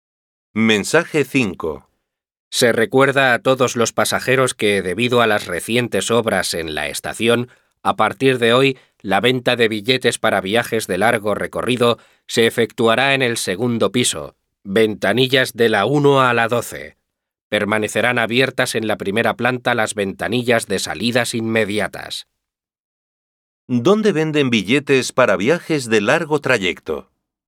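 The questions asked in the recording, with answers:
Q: ¿Dónde venden billetes para viajes de largo trayecto?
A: En el segundo piso, en las ventanillas 1 a 12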